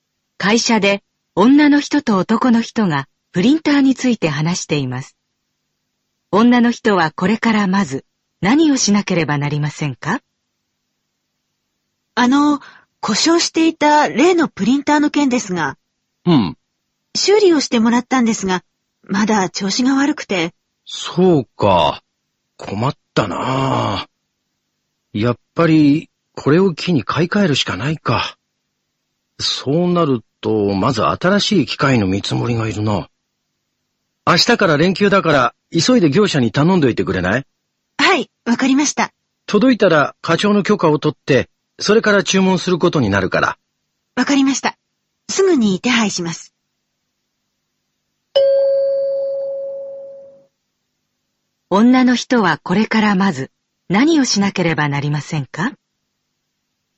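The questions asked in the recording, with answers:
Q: 女の人はこれからまず何をしなければなりませんか?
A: 業者に新しいプリンターの見積もりを頼む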